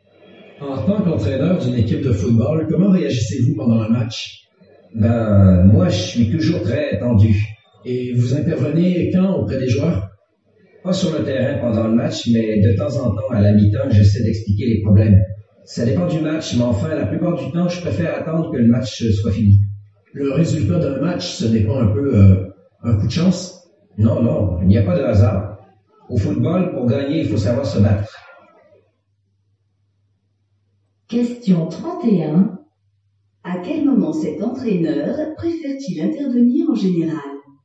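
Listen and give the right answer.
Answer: Après le match, une fois le match fini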